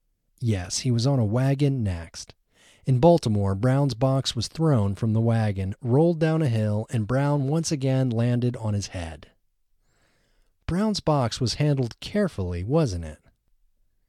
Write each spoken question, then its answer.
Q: Brown's box was handled carefully, wasn't it?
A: No, his box wasn't handled carefully.